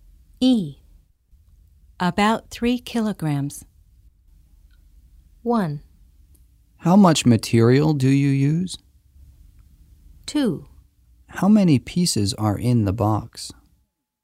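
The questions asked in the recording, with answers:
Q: About 3 kilograms.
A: 1: How much material do you use?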